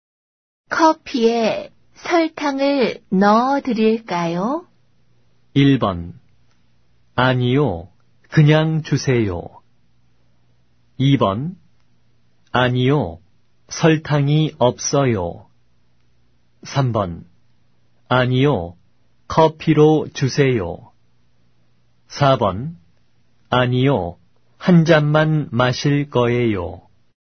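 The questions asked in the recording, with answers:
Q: 커피에 설탕을 넣어 드릴까요?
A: 1: 아니요. 그냥 주세요.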